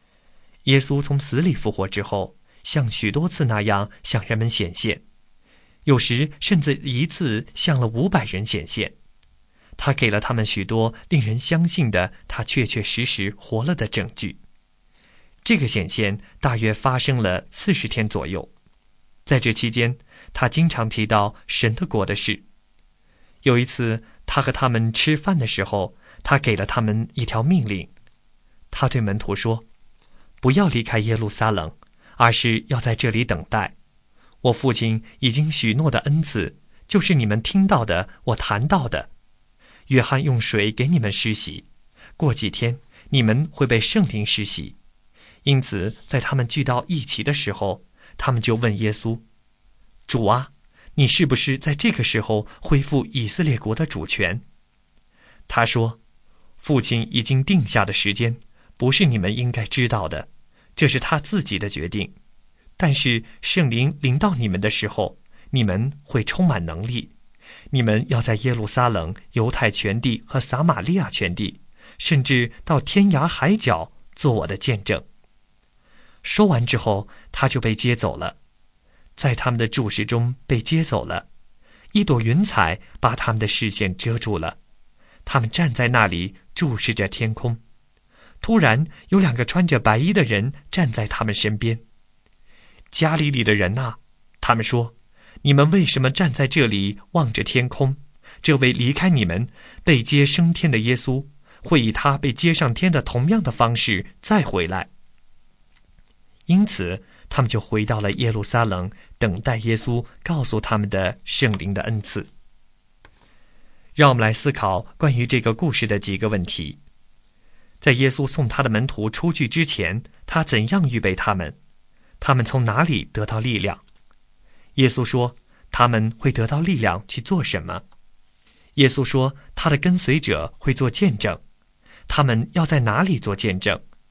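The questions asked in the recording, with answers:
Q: 他们从哪里得到力量?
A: 从圣灵(圣灵临到他们的时候)

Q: 耶稣说他们会得到力量去做什么?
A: 做耶稣的见证

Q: 耶稣说他的跟随者会做见证,他们要在哪里做见证?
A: 在耶路撒冷、犹太全地和撒玛利亚全地,直到天涯海角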